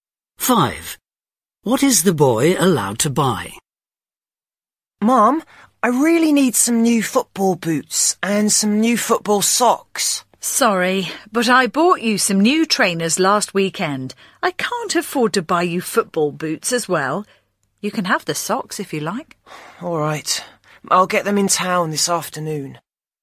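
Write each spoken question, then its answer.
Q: What is the boy allowed to buy?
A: football socks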